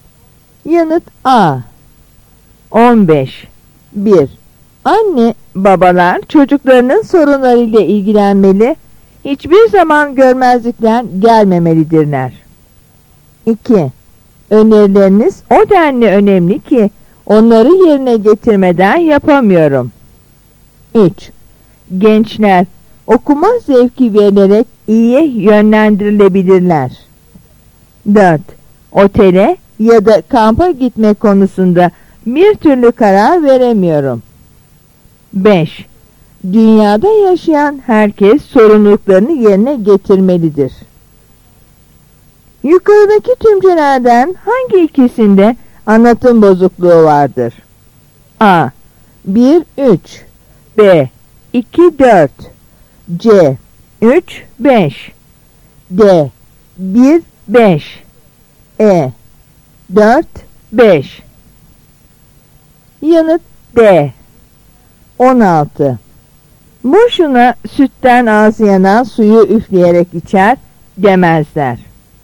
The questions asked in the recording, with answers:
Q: Yukarıdaki tümcelerden hangi ikisinde anlatım bozukluğu vardır?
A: Yanıt D.